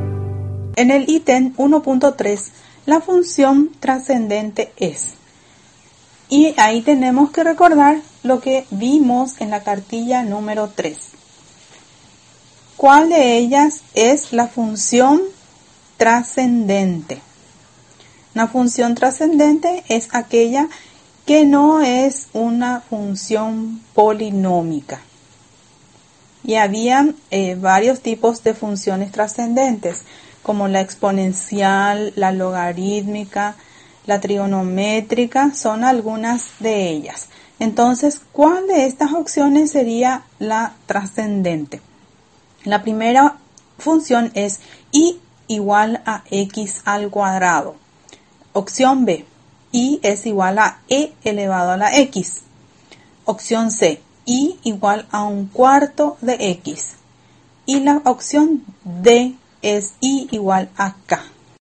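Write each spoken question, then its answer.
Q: la función trascendente es.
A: B: y es igual a e elevado a la x.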